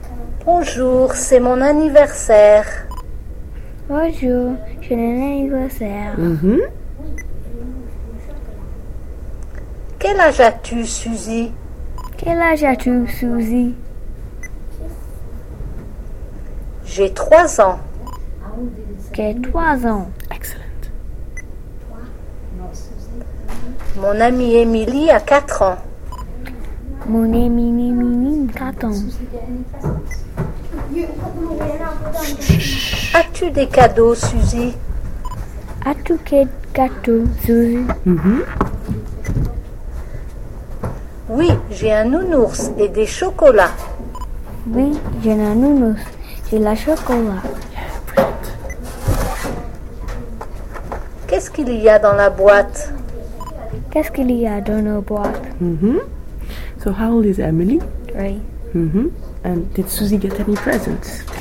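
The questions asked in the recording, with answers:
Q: And did Suzy get any presents?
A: Yes, a teddy bear and chocolates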